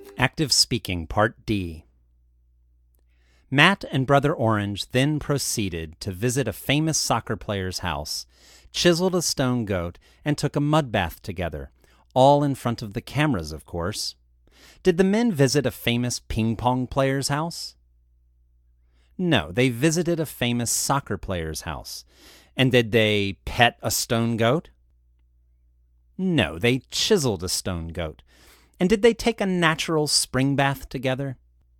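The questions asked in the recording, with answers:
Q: Did the men visit a famous ping-pong player's house?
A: No, they visited a famous soccer player's house.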